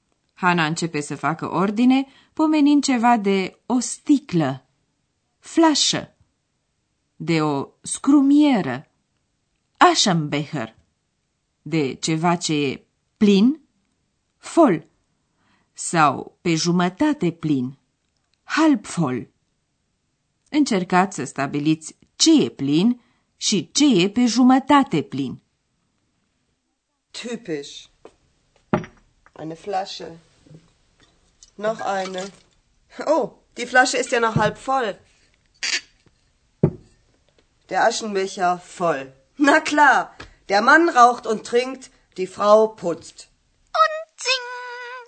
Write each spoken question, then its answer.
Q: Încercați să stabiliți ce e plin și ce e pe jumătate plin.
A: Așadar, scrumiera e plină, iar o sticlă de vin e pe jumătate plină.